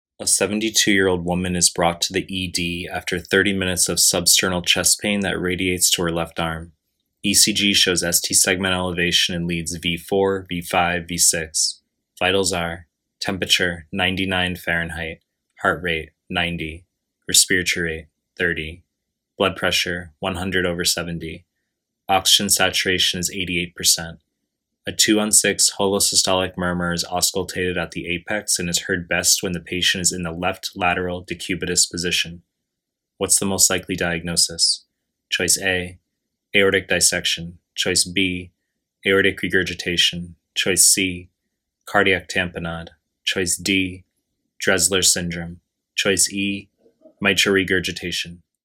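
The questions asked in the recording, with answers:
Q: What's the most likely diagnosis?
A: E: mitral regurgitation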